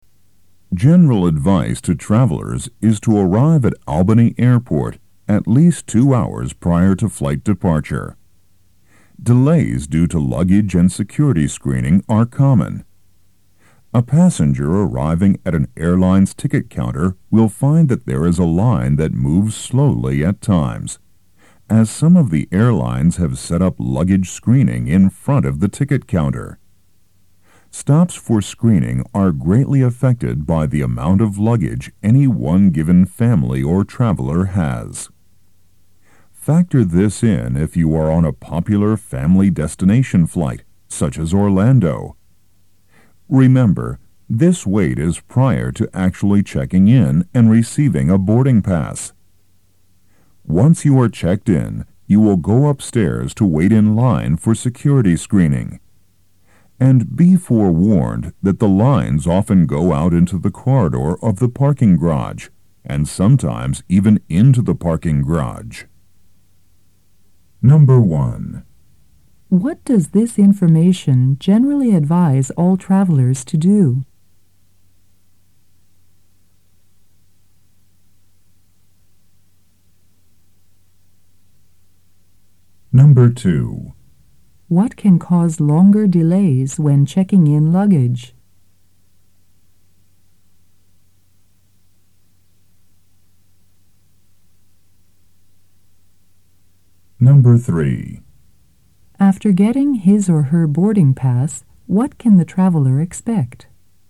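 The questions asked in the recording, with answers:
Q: What does this information generally advise all travelers to do?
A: Arrive at the airport at least 2 hours before departure

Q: What can cause longer delays when checking in luggage?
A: The amount of luggage a family or traveler has

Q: After getting his or her boarding pass, what can the traveler expect?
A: Long security screening lines, sometimes into the parking garage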